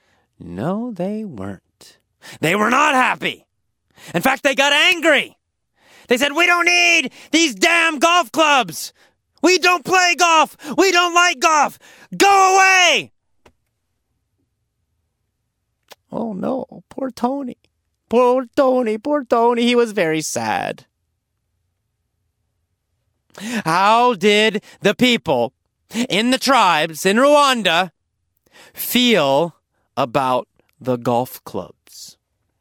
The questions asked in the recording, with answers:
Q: How did the people in the tribes in Rwanda feel about the golf clubs?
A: They were angry.